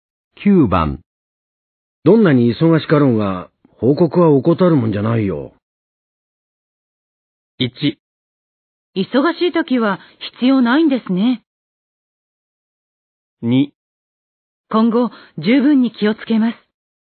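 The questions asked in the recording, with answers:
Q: どんなに忙しかろうが、報告は怠るもんじゃないよ。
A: 2: 今後、十分に気をつけます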